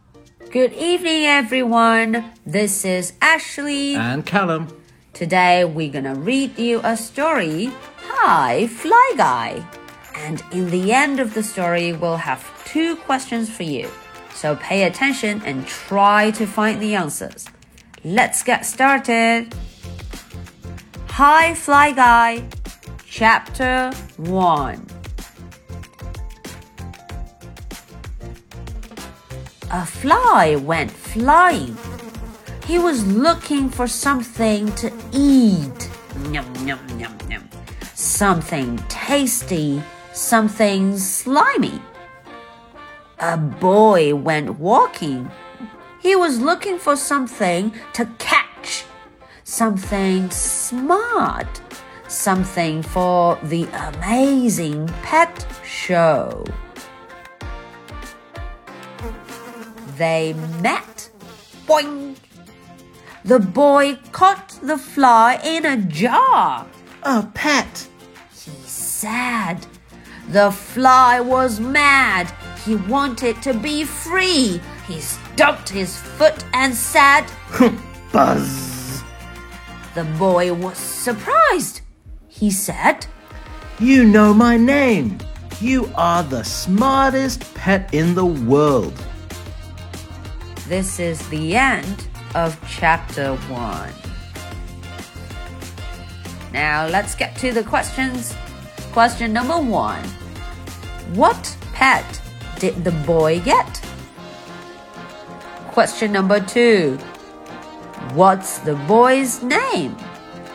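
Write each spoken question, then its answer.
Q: What pet did the boy get?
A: A fly

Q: What's the boy's name?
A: Buzz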